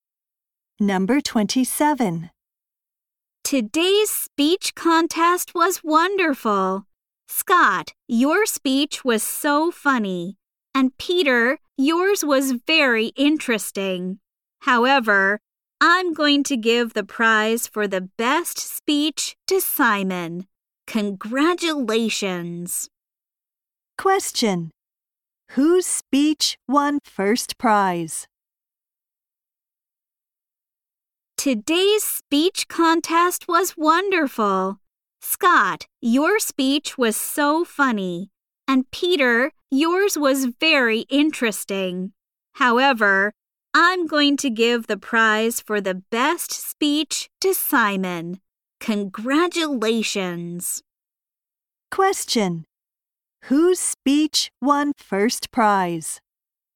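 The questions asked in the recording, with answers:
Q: Whose speech won first prize?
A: Simon's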